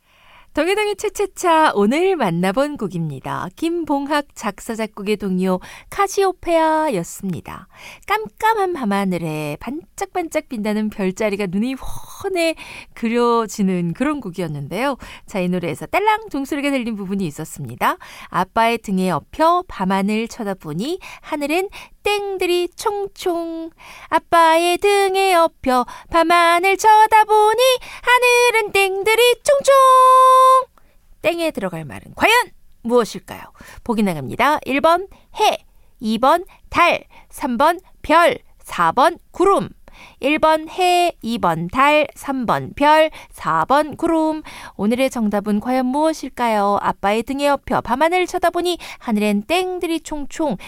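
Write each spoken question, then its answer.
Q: 땡에 들어갈 말은 과연 무엇일까요?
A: 3번: 별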